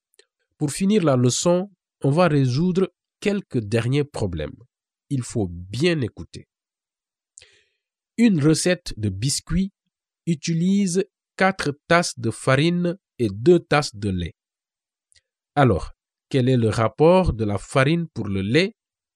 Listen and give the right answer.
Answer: Le rapport est de 4 pour 2.